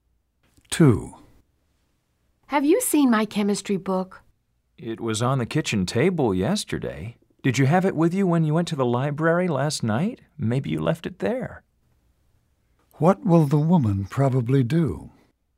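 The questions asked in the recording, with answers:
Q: What will the woman probably do?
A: Look for the book at the library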